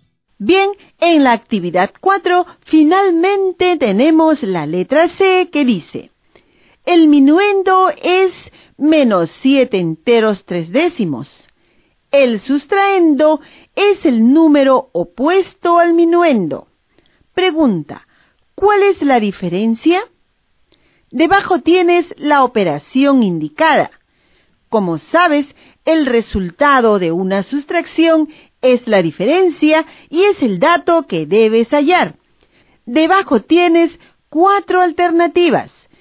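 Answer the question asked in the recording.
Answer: menos 14 enteros 6 décimos (-14,6)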